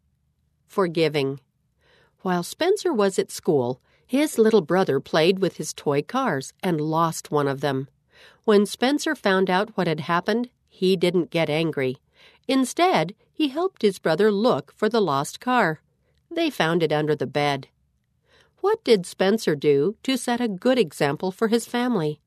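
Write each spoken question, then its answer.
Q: What did Spencer do to set a good example for his family?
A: He didn't get angry and helped his brother look for the lost car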